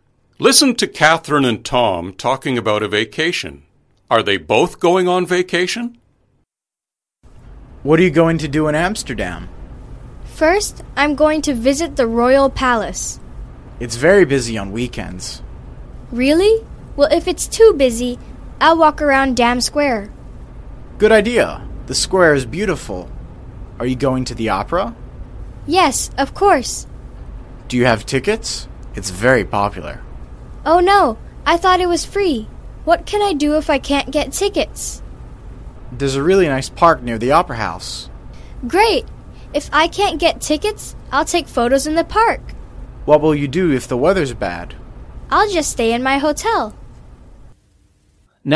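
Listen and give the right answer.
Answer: No, only one of them is going (to Amsterdam).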